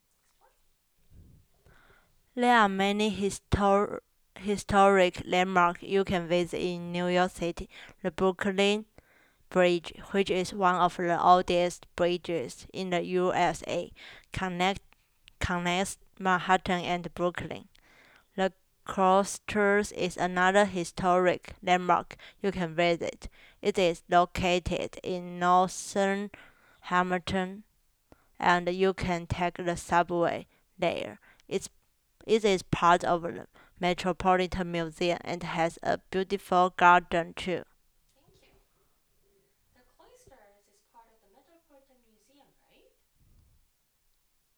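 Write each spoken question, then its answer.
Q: The Cloisters is part of the Metropolitan Museum,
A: Yes, it is part of the Metropolitan Museum.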